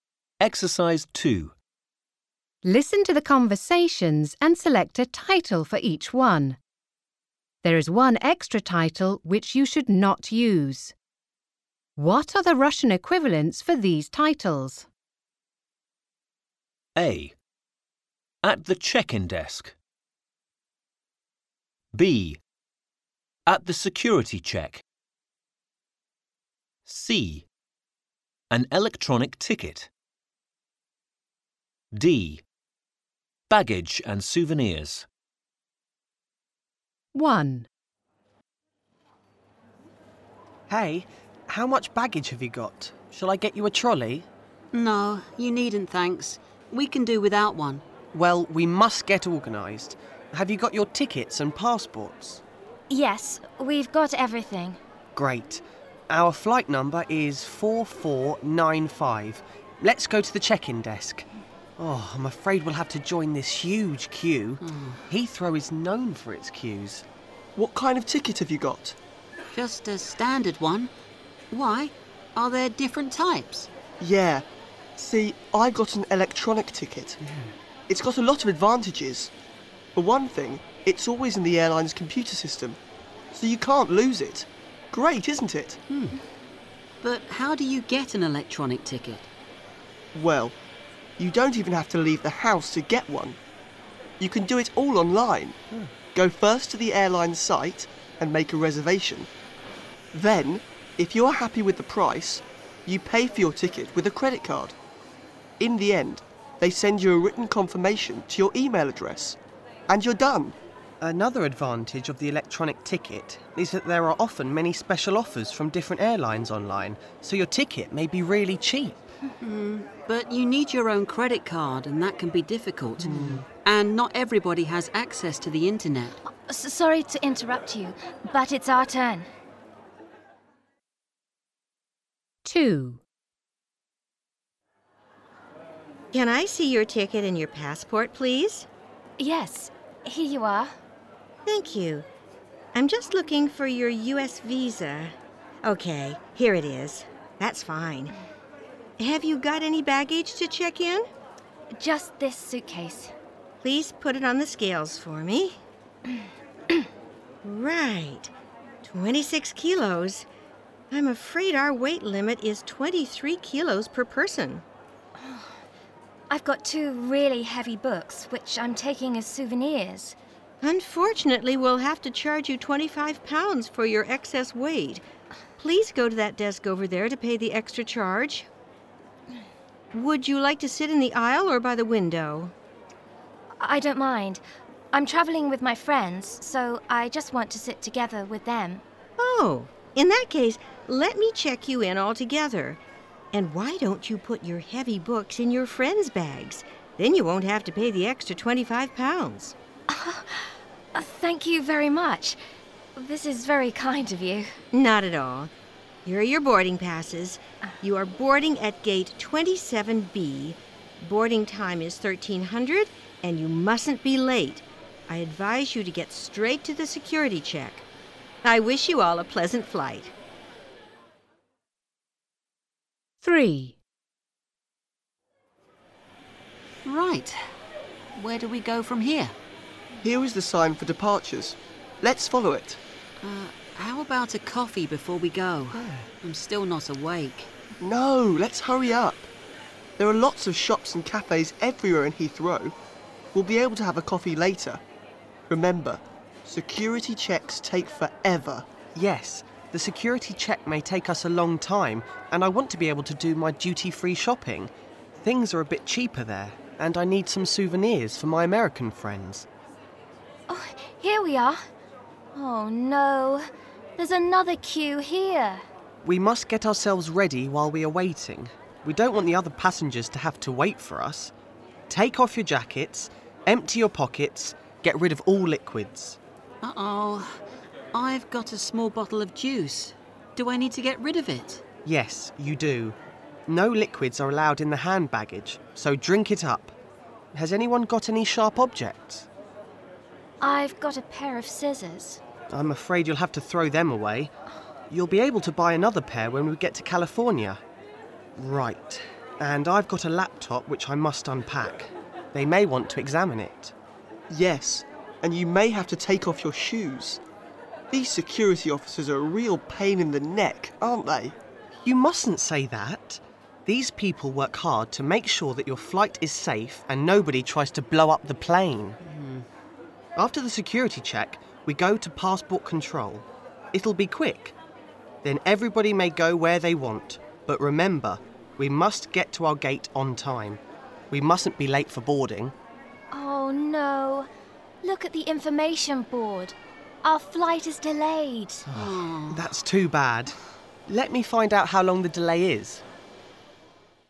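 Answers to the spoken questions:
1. C: An electronic ticket.
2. A: At the check-in desk.
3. B: At the security check.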